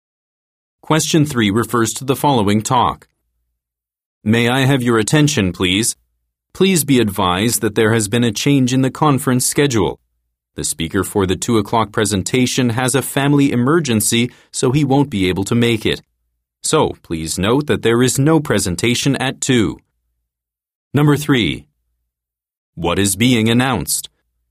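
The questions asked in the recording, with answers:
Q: What is being announced?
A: A conference schedule change: the 2 o'clock presentation is cancelled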